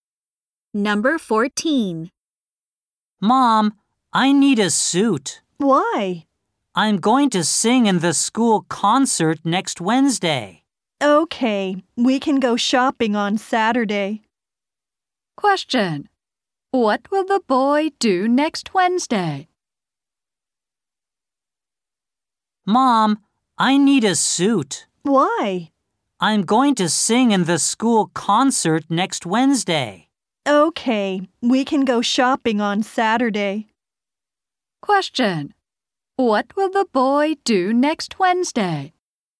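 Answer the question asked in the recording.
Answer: Sing in the school concert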